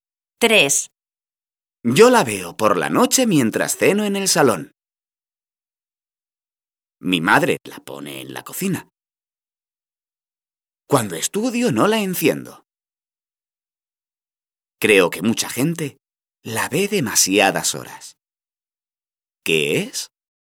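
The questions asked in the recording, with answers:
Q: ¿Qué es?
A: la televisión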